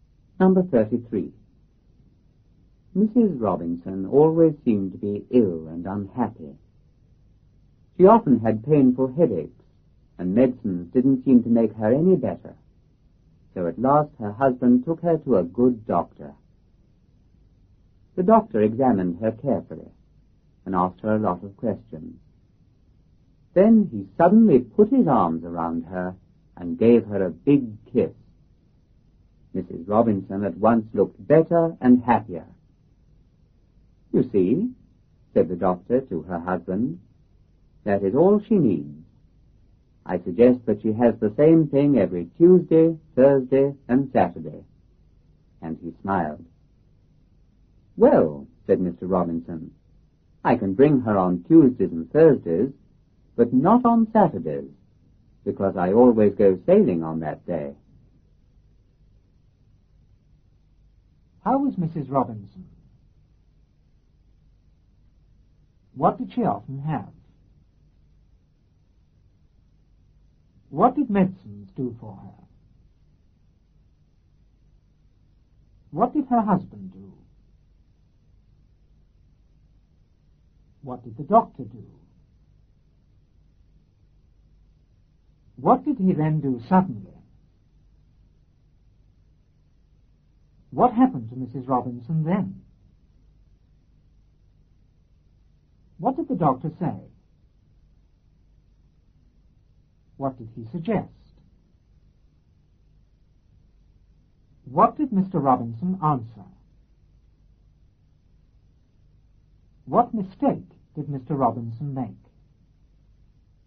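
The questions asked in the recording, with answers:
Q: How was Mrs. Robinson?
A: Always ill and unhappy

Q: What did she often have?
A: Painful headaches

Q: What did medicines do for her?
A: They didn't make her any better

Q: What did her husband do?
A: He took her to a good doctor

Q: What did the doctor do?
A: He examined her carefully and asked her a lot of questions

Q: What did he then do suddenly?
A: He put his arms around her and gave her a big kiss

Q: What happened to Mrs. Robinson then?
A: She at once looked better and happier

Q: What did the doctor say?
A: That is all she needs

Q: What did he suggest?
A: That she has the same thing every Tuesday, Thursday and Saturday

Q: What did Mr. Robinson answer?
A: He could bring her on Tuesdays and Thursdays, but not on Saturdays, because he always goes sailing then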